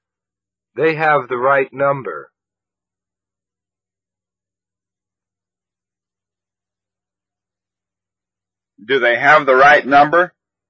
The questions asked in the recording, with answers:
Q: Do they have the right number?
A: Yes, they have the right number.